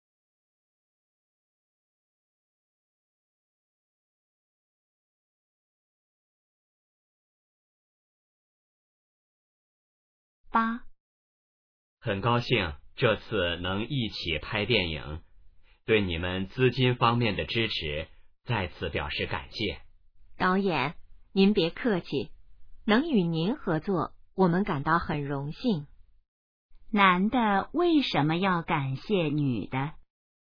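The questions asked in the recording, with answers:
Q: 男的为什么要感谢女的?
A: 女的在资金方面给予支持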